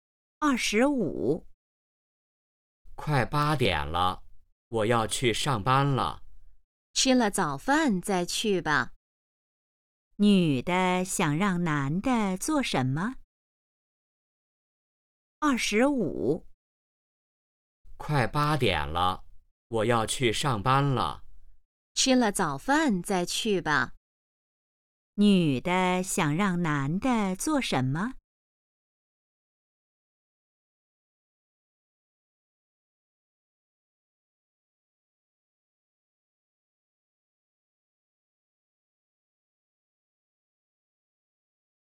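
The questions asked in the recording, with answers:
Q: 女的想让男的做什么?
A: 吃早饭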